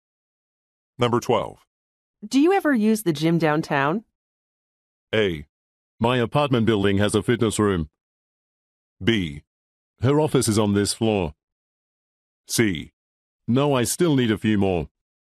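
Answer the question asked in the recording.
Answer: A: My apartment building has a fitness room.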